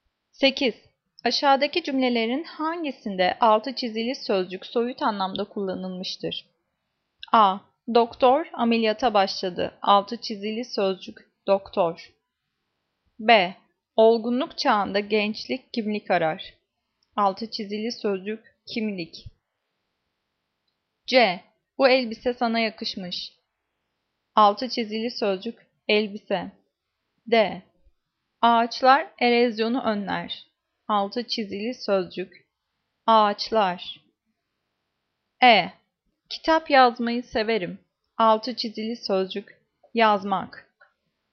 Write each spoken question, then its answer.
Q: Aşağıdaki cümlelerin hangisinde altı çizili sözcük soyut anlamda kullanılmıştır?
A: Cevap B. Olgunluk çağında gençlik kimlik arar.